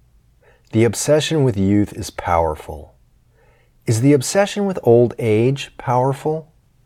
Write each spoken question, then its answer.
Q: Is the obsession with old age powerful?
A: No, the obsession with old age isn't powerful.